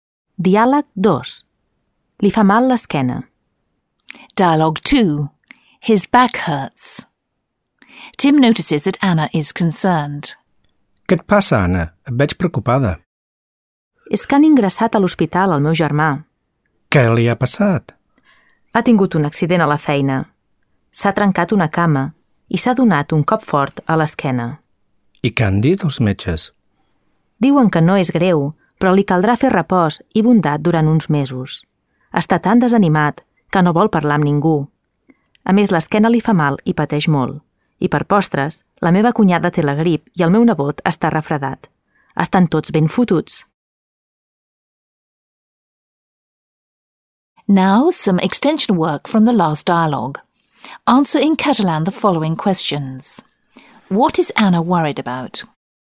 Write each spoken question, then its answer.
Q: What is Anna worried about?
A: Han ingressat a l'hospital el seu germà.